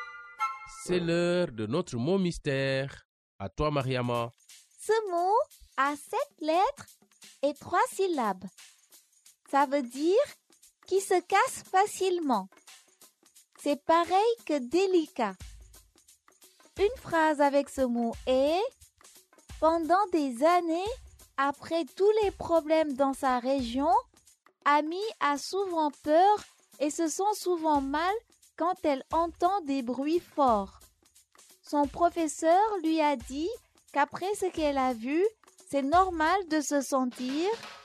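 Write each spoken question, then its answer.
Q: Ce mot a 7 lettres et 3 syllabes.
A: fragile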